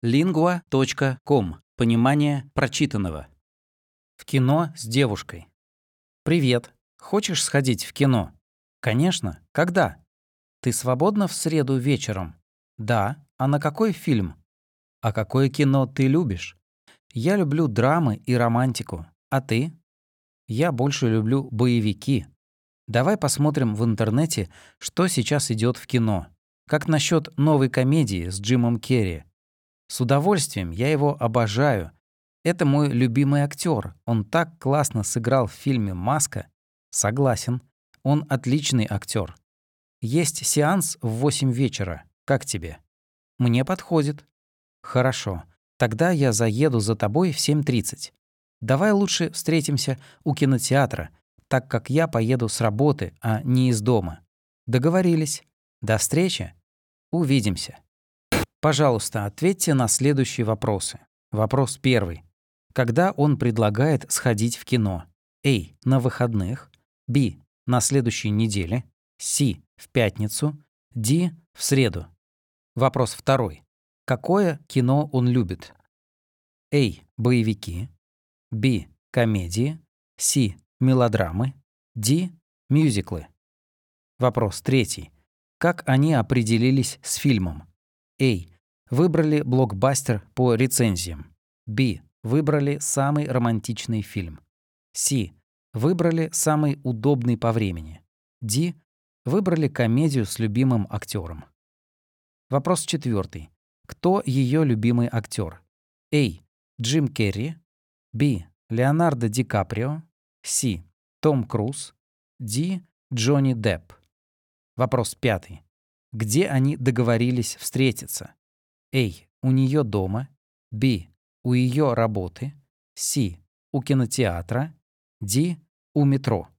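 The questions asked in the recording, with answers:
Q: Когда он предлагает сходить в кино?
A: D: В среду.

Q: Какое кино он любит?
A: A: Боевики.

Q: Как они определились с фильмом?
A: D: Выбрали комедию с любимым актером.

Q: Кто ее любимый актер?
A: A: Джим Керри.

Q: Где они договорились встретиться?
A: C: У кинотеатра.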